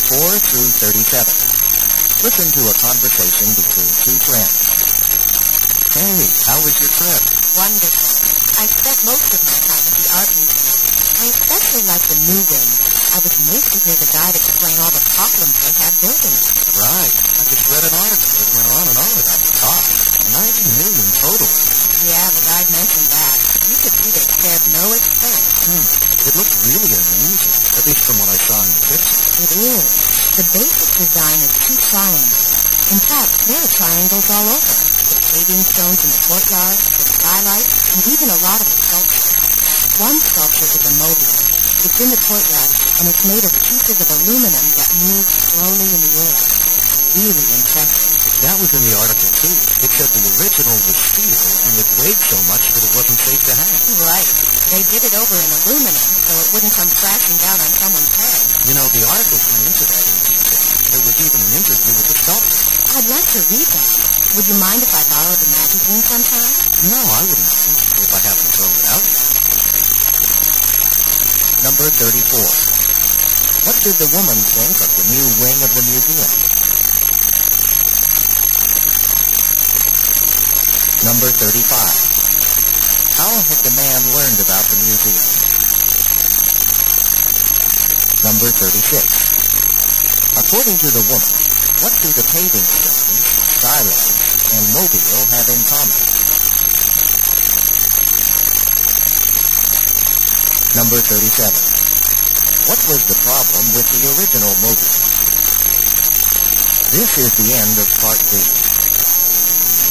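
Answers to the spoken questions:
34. She liked it very much and found it impressive
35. By reading a magazine article
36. They are all triangles
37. It was steel and too heavy to hang safely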